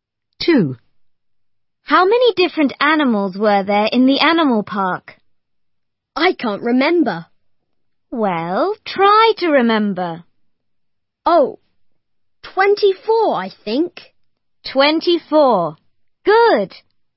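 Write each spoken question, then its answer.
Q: How many different animals were there in the animal park?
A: 24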